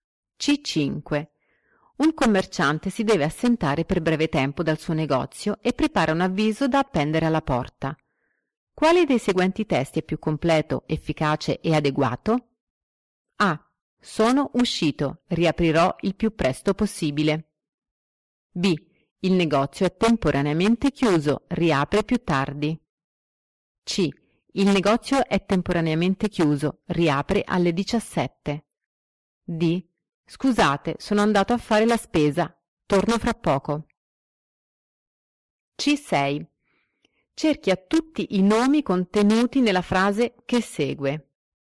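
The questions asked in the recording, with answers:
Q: Quale dei seguenti testi è più completo, efficace e adeguato?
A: C: Il negozio è temporaneamente chiuso. Riapre alle 17.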